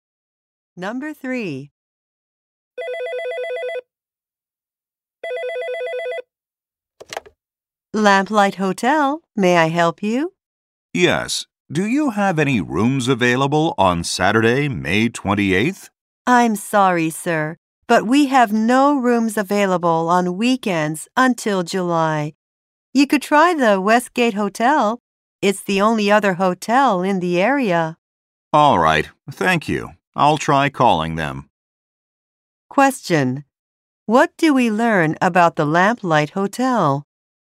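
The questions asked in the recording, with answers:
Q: What do we learn about the Lamplight Hotel?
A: It has no rooms available on weekends until July.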